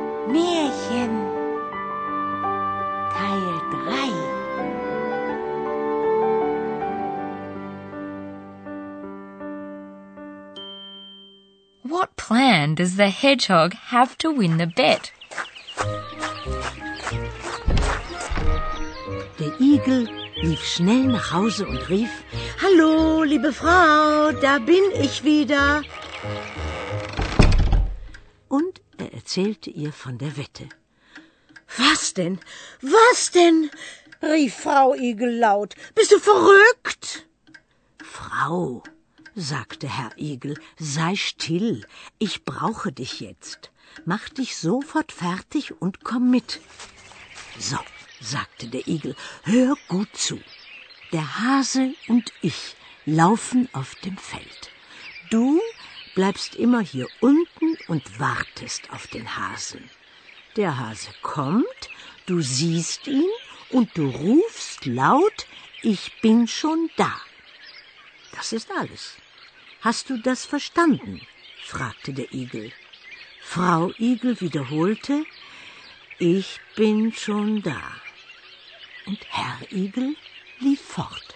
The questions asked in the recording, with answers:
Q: What plan does the hedgehog have to win the bet?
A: The hedgehog's plan was to get his wife involved in the action.